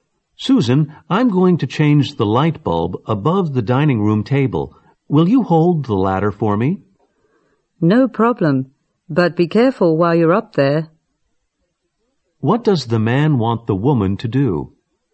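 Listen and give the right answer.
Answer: Hold the ladder for him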